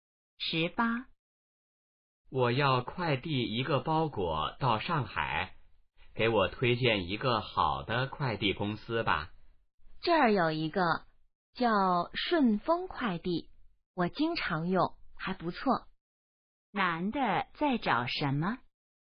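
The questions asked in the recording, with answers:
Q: 男的在找什么?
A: 好的快递公司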